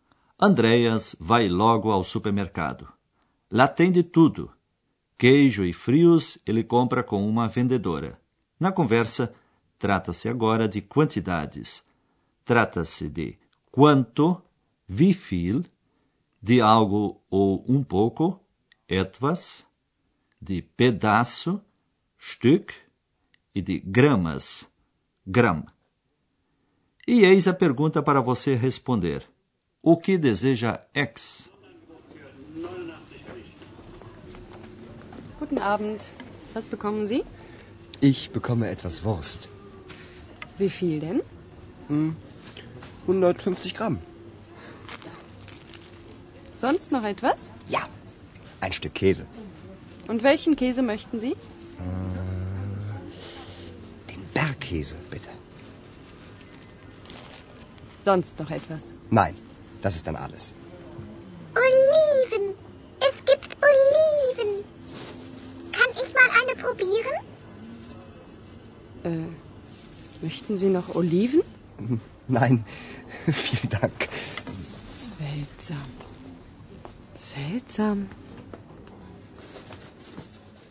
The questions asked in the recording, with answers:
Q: O que deseja X?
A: Perto da vendedora, X descobriu azeitonas e disse que queria provar uma.